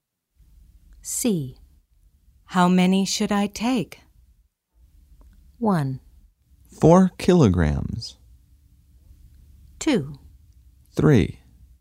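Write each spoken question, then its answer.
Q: How many should I take?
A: 2: 3.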